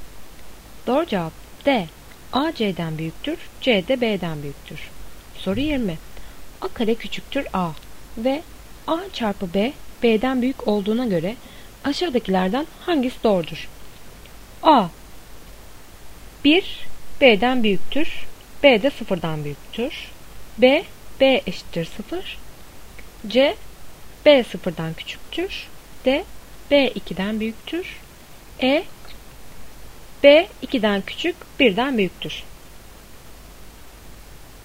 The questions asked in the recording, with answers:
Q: A kare küçüktür A ve A çarpı B, B'den büyük olduğuna göre aşağıdakilerden hangisi doğrudur?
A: Doğru cevap C. B 0'dan küçüktür.